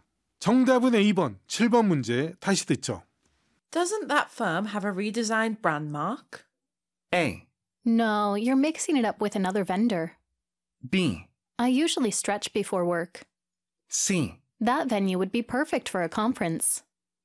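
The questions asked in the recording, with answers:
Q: Doesn't that firm have a redesigned brand mark?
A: A: No, you're mixing it up with another vendor.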